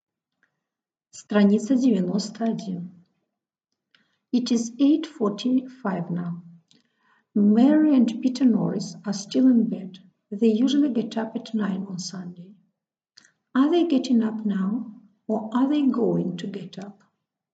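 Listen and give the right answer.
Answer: They are going to get up.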